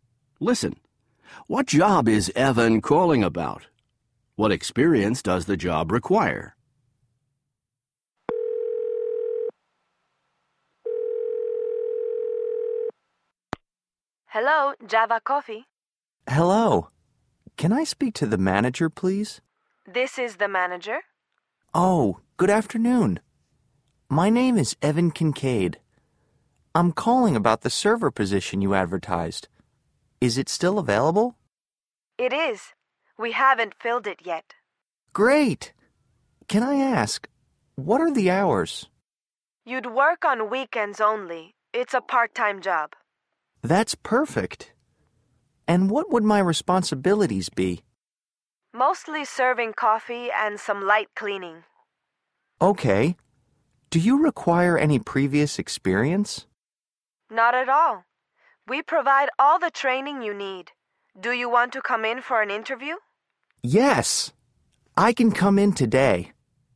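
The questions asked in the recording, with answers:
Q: What job is Evan calling about?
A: The server position at Java Coffee

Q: What experience does the job require?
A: None; they provide all the training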